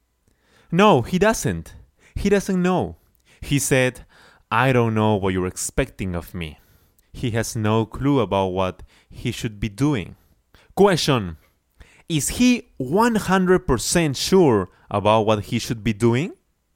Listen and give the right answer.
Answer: No, of course not.